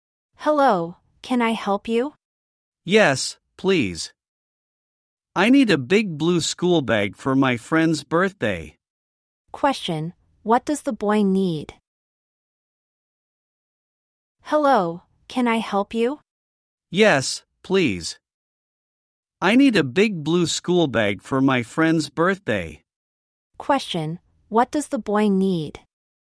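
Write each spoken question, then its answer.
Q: what does the boy need?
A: A big blue school bag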